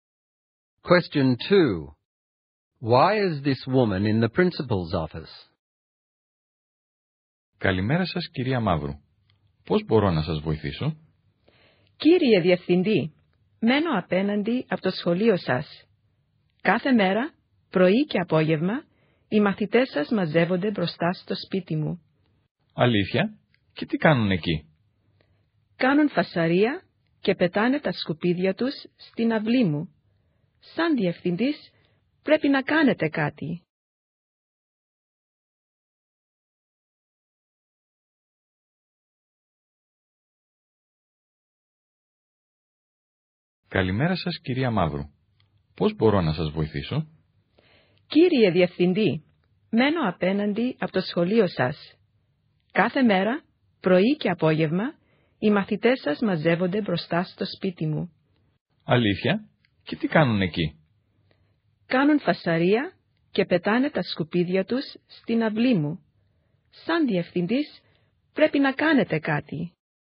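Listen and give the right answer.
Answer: To complain that students gather outside her house every day, making noise and throwing rubbish into her yard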